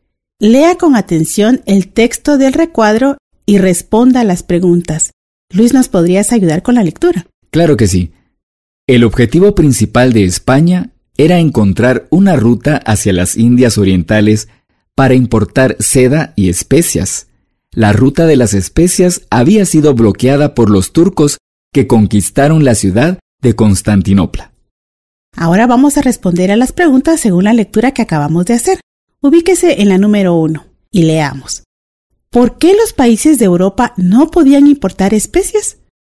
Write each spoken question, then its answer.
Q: ¿Por qué los países de Europa no podían importar especias?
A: Porque los turcos habían tomado Constantinopla y la ruta estaba cerrada.